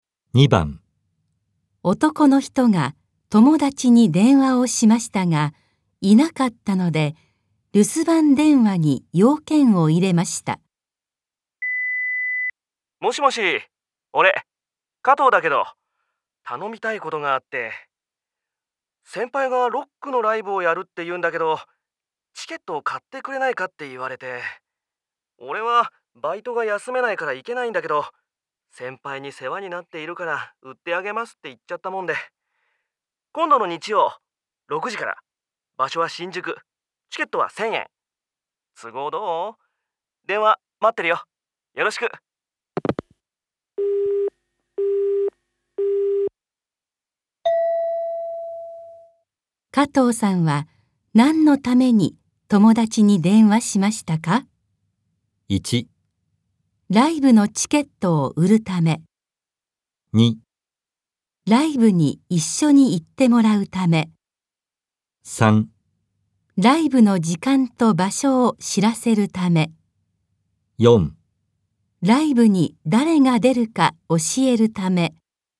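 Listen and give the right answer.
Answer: 1: ライブのチケットを売るため。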